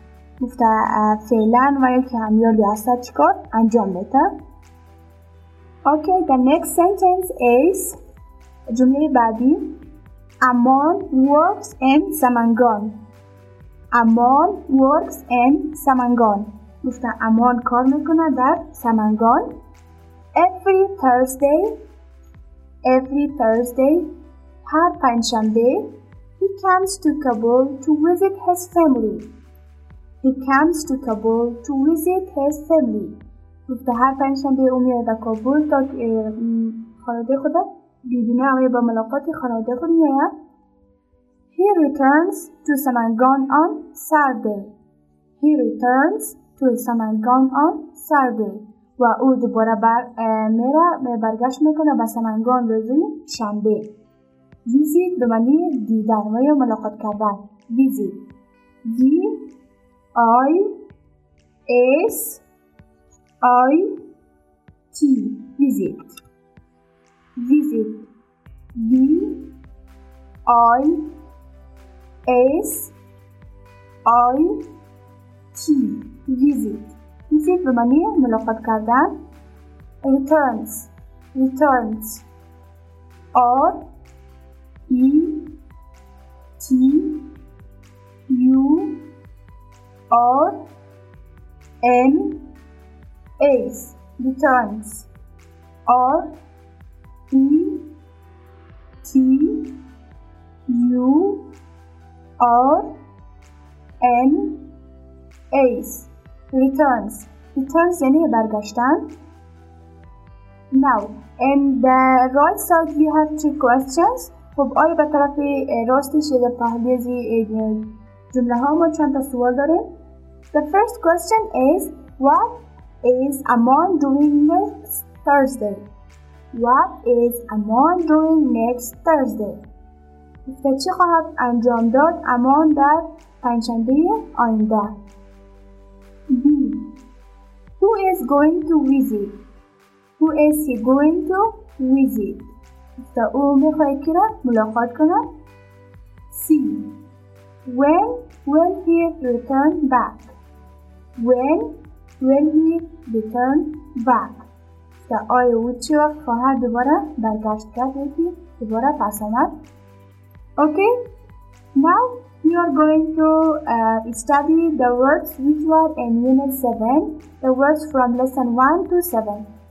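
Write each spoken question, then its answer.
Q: What is Amon doing next Thursday?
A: He is coming to Kabul to visit his family.

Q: Who is he going to visit?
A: His family

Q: When will he return back?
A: On Saturday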